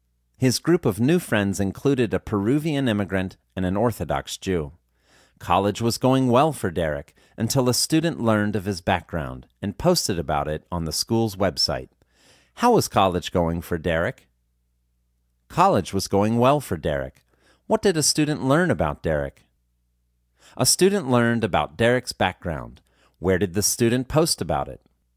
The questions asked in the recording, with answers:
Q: How was college going for Derek?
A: College was going well for Derek.

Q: Where did the student post about it?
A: The student posted about it on the school's website.